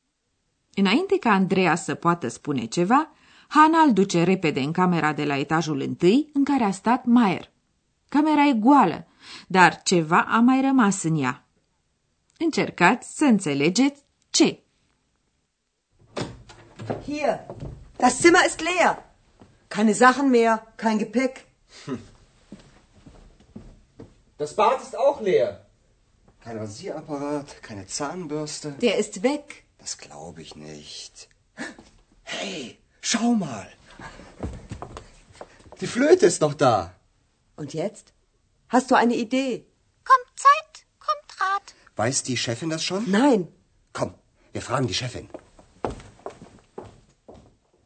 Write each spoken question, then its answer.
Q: Camera e goală, dar ceva a mai rămas în ea.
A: Singurul lucru rămas în camera goală este flautul domnului Maier.